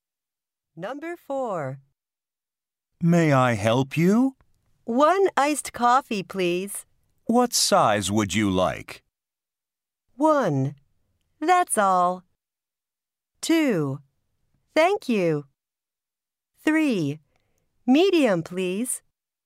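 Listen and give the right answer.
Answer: 3: Medium, please.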